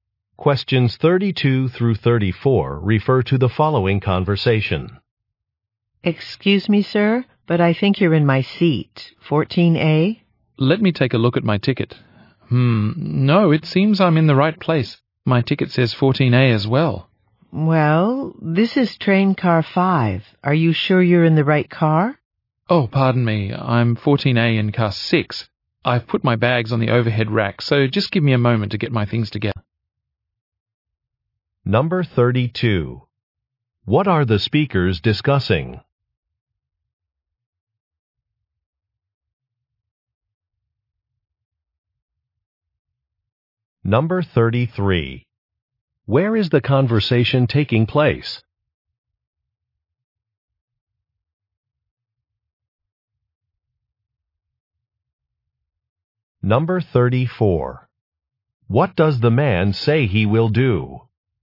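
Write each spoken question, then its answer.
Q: What are the speakers discussing?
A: A seat assignment

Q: Where is the conversation taking place?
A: On a train

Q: What does the man say he will do?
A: Gather his belongings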